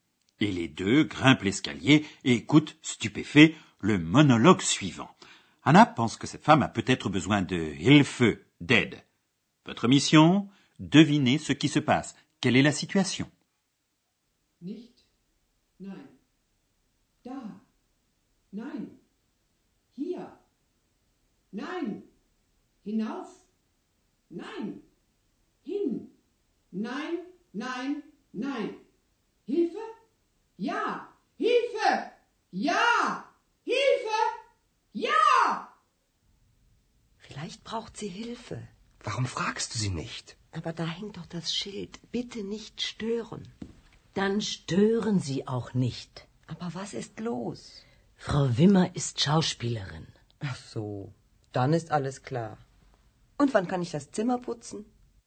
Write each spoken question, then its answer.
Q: Devinez ce qui se passe.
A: Oui, Madame Wimmer est comédienne et elle répète un rôle.